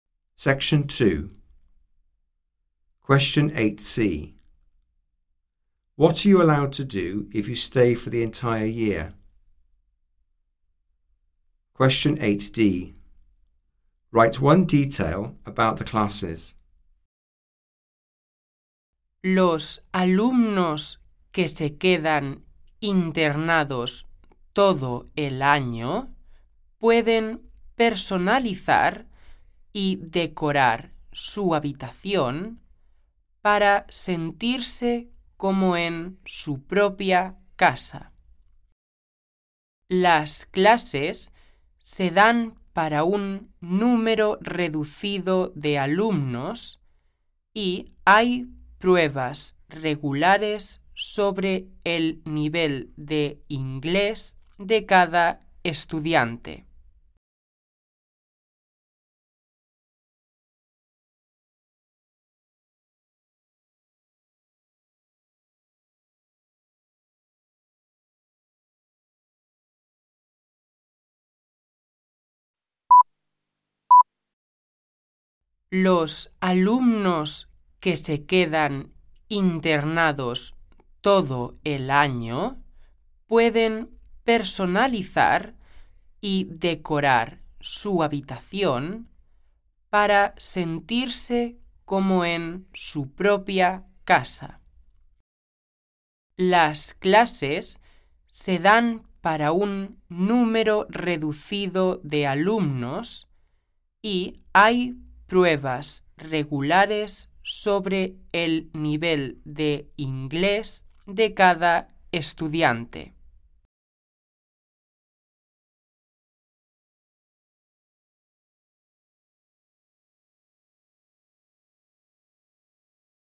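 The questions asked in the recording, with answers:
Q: What are you allowed to do if you stay for the entire year?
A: Personalise and decorate their room

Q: Write one detail about the classes.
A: Small classes; regular English level tests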